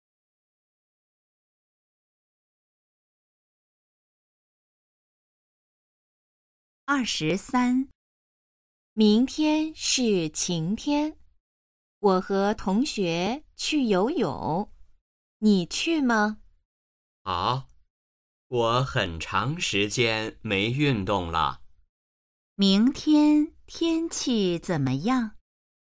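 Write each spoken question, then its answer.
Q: 明天天气怎么样?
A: 晴天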